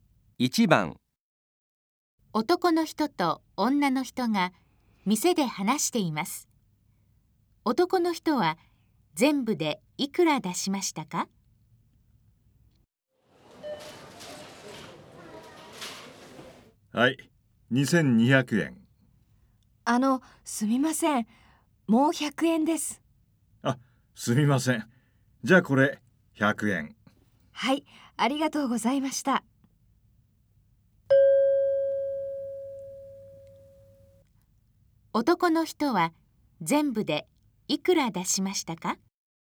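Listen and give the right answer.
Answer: 2300円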